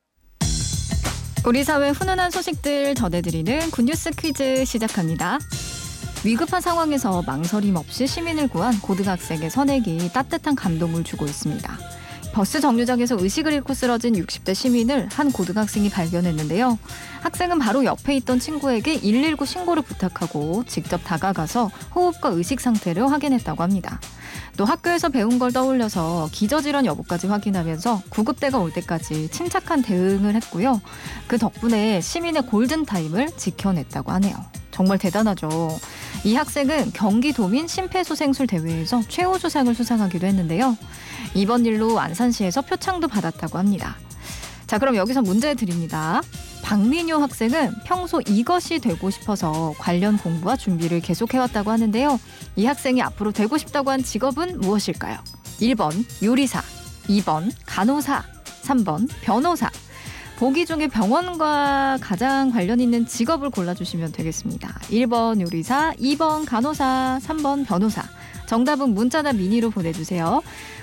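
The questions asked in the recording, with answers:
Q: 이 학생이 앞으로 되고 싶다고 한 직업은 무엇일까요?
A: 2번: 간호사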